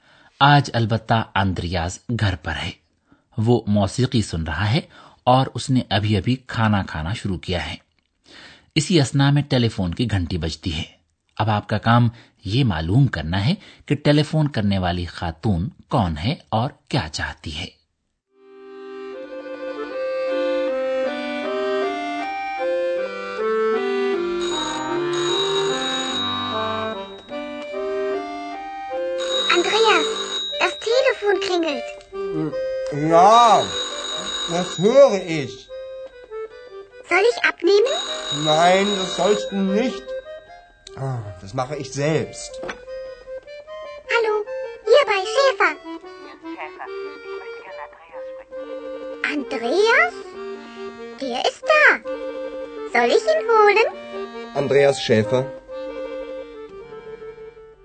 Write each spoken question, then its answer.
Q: اب آپ کا کام یہ معلوم کرنا ہے کہ ٹیلی فون کرنے والی خاتون کون ہے اور کیا چاہتی ہے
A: ٹیلی فون کرنے والی خاتون اندریاس کے ساتھ بات کرنا چاہتی تھی